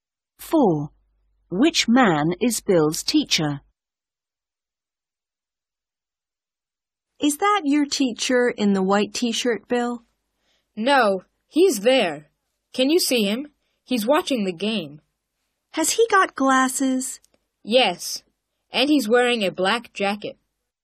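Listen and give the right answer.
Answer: the man with glasses and a black jacket, watching the game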